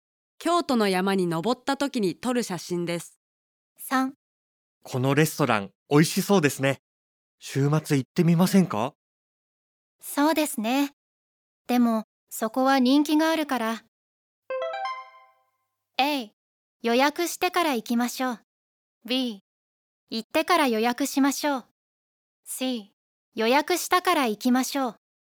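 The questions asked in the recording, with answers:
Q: このレストラン、美味しそうですね。週末行ってみませんか?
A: A: 予約してから行きましょう。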